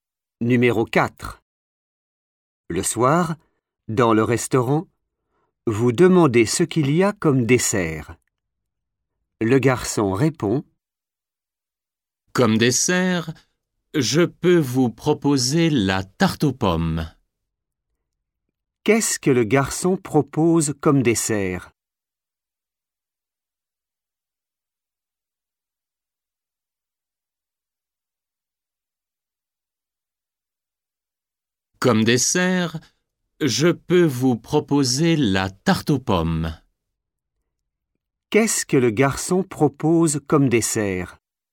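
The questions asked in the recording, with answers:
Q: Qu'est-ce que le garçon propose comme dessert?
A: la tarte aux pommes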